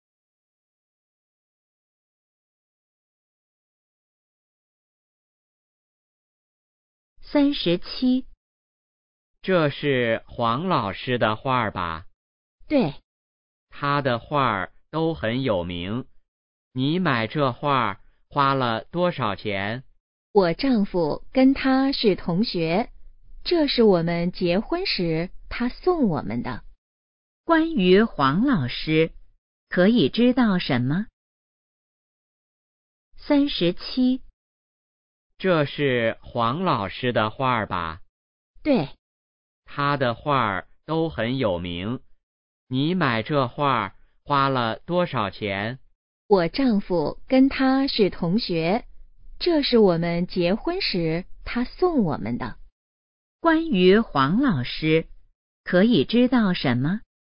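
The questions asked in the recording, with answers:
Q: 关于黄老师,可以知道什么?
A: 他的画很有名,是女的丈夫的同学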